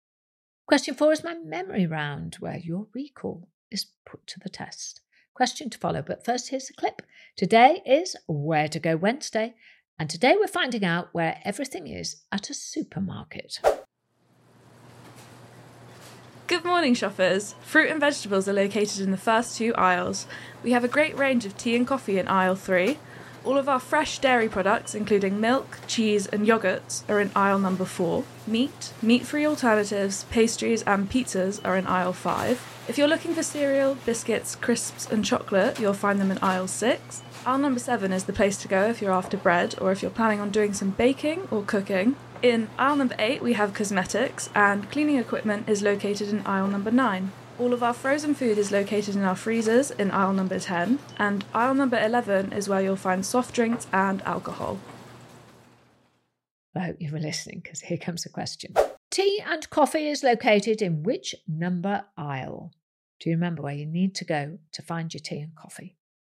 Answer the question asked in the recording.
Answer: The tea and coffee would be found in aisle number 3.